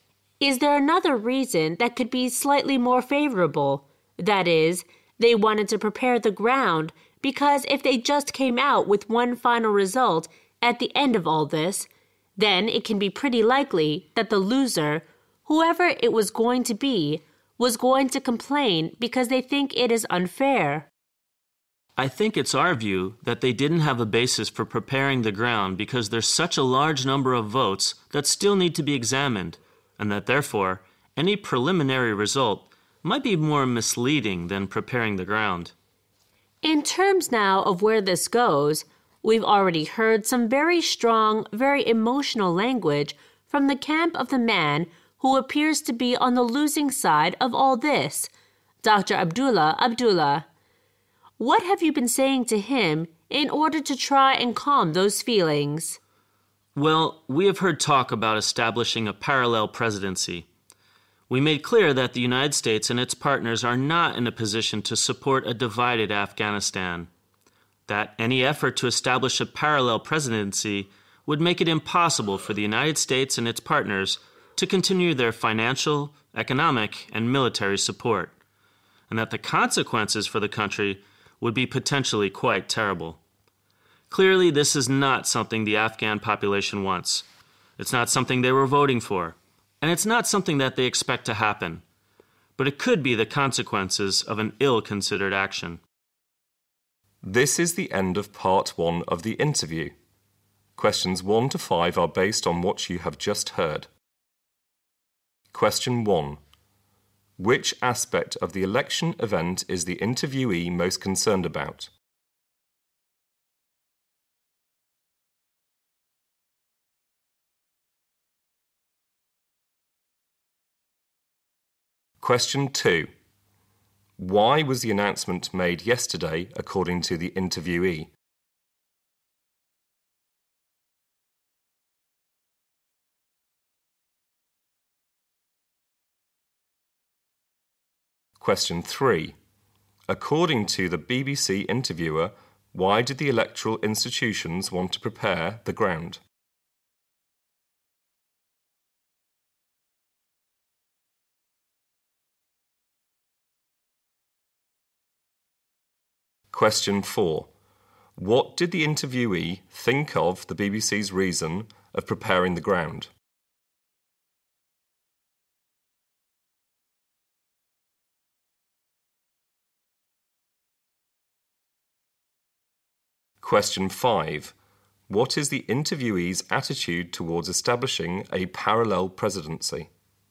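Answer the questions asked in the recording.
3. Because if they only announced one final result at the end, the loser would likely complain that it was unfair
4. He thought there was no basis for it, because so many votes still had to be examined that a preliminary result might be misleading
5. He is firmly against it: the US and its partners would not support a divided Afghanistan and would have to stop their support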